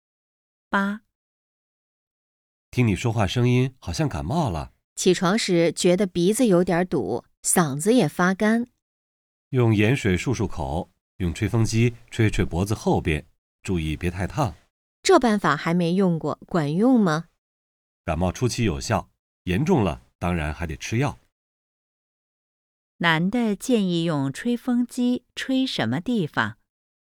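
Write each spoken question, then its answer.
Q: 男的建议用吹风机吹什么地方?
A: 脖子后边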